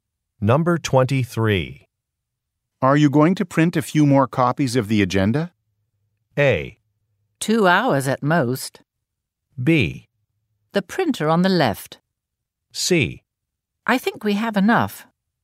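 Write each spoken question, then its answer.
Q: Are you going to print a few more copies of the agenda?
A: C: I think we have enough.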